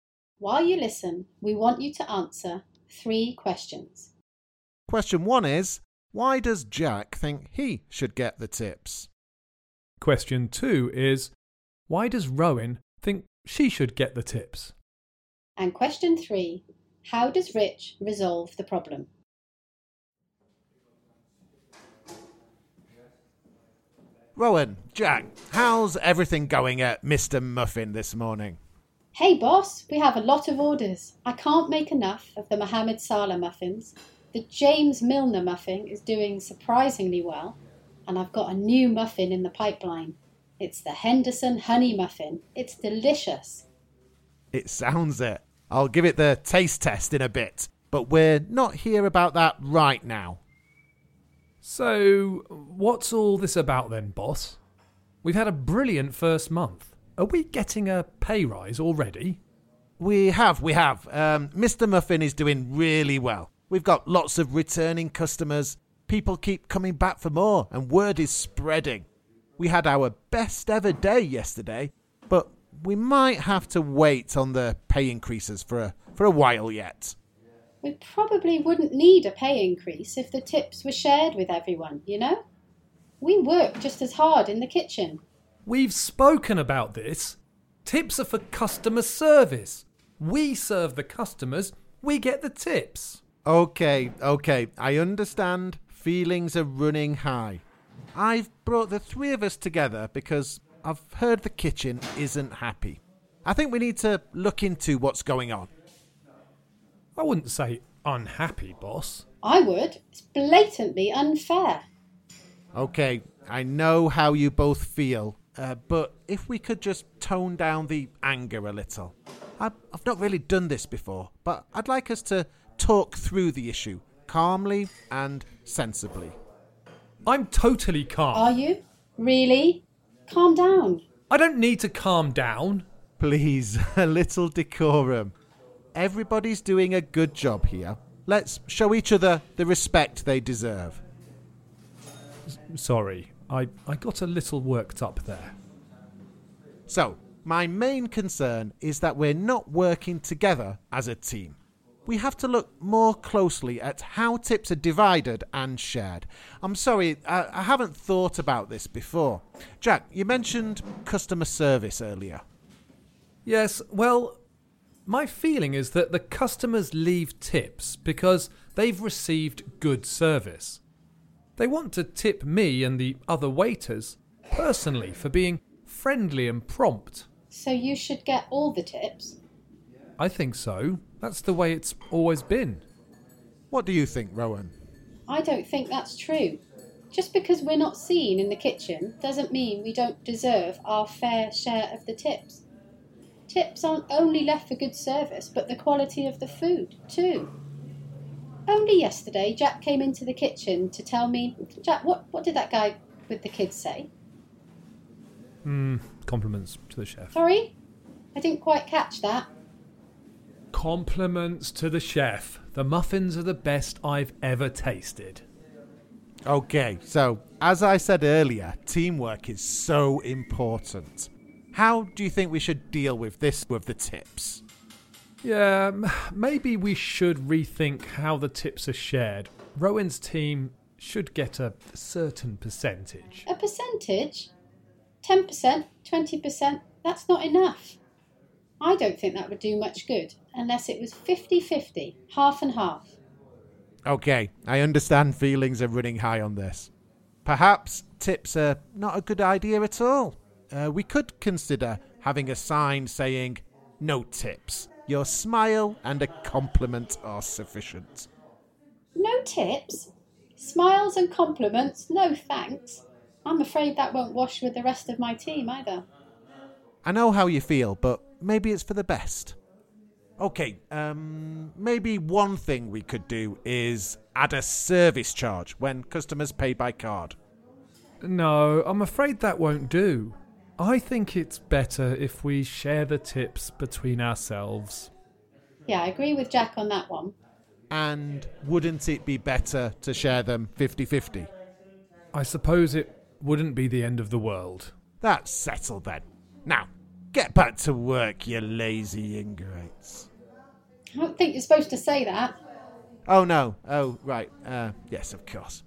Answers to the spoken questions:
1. Jack thinks as a waiter, the customers give tips for good service that is friendly and prompt.
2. because customers leave tips because the food was good, and I made the food.
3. I let both of them speak and talk about